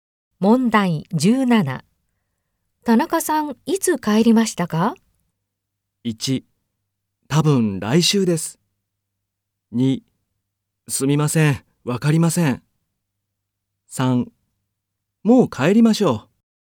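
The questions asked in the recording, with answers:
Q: 田中さん、いつ帰りましたか?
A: 3: すみません、わかりません。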